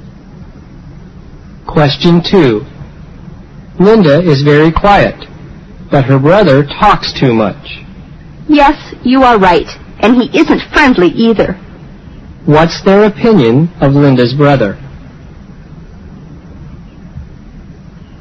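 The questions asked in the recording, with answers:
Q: What's their opinion of Linda's brother?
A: He talks too much and isn't friendly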